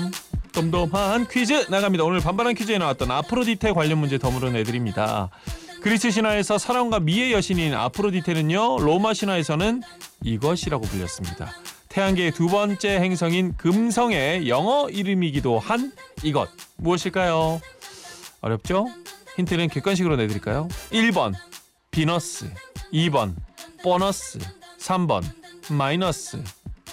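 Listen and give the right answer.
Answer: 1: 비너스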